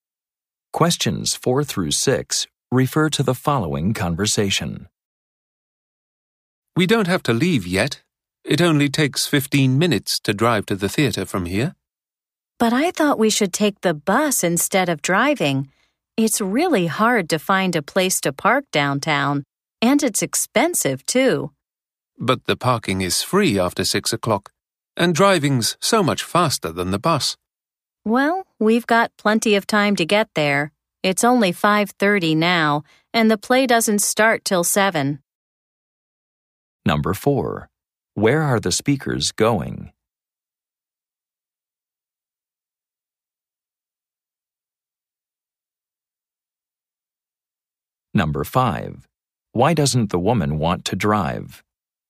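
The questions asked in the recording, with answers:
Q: Where are the speakers going?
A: To the theater (a play)

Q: Why doesn't the woman want to drive?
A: Parking downtown is hard to find and expensive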